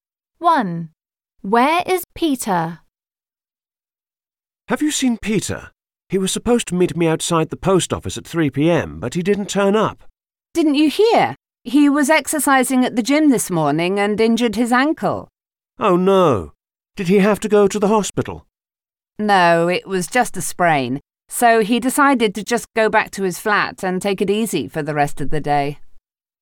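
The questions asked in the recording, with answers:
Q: Where is Peter?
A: At his flat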